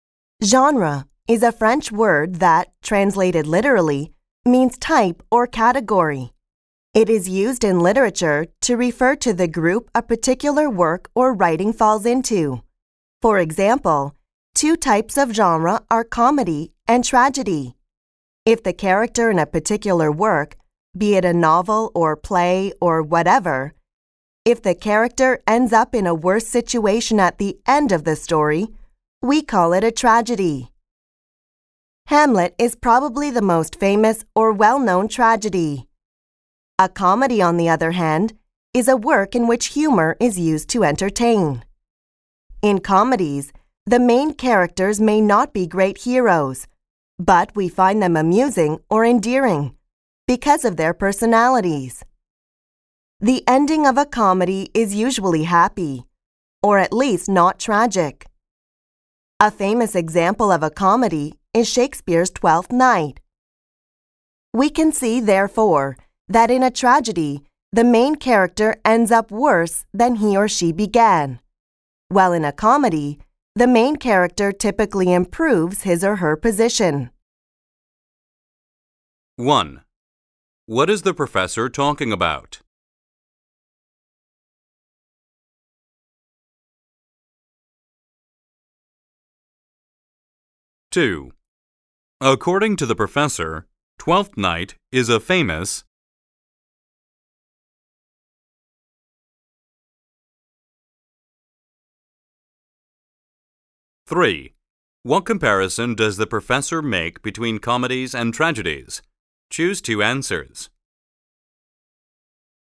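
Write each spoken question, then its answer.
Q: What is the professor talking about?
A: Literary genres: comedy and tragedy

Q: According to the professor, Twelfth Night is a famous...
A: comedy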